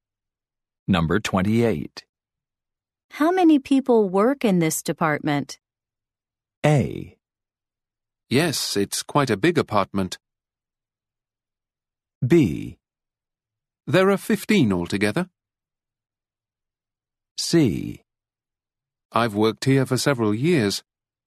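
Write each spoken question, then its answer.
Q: How many people work in this department?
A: B: There are 15 altogether.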